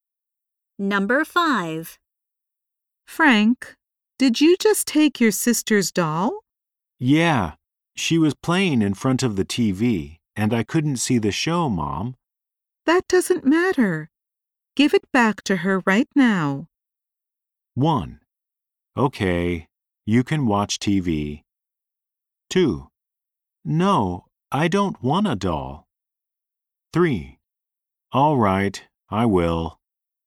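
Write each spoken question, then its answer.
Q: That doesn't matter. Give it back to her right now.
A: 3: All right, I will.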